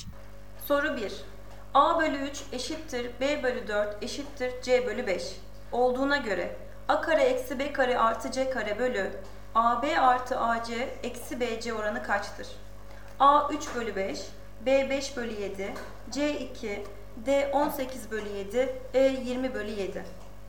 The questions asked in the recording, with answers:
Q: Olduğuna göre A kare eksi B kare artı C kare bölü AB artı AC eksi BC oranı kaçtır?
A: Doğru cevap D 18 bölü 7.